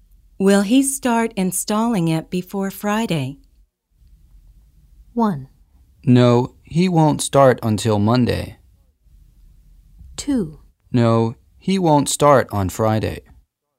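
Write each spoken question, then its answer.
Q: Will he start installing it before Friday?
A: 1: No, he won't start until Monday.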